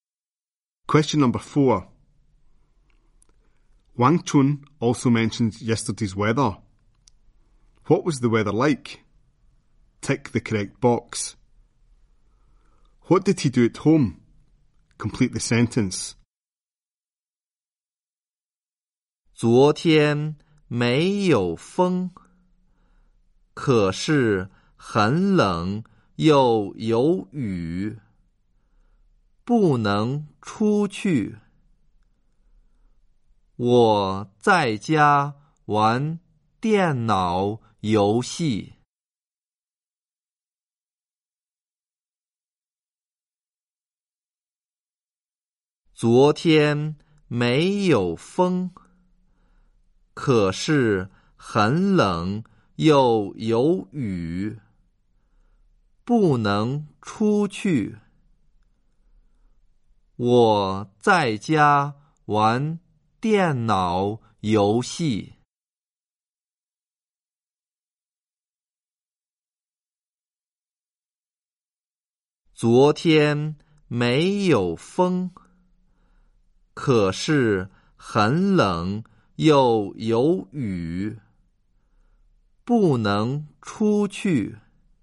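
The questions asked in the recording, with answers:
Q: What was the weather like?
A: Not windy, but cold and rainy

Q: What did he do at home?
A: Played computer games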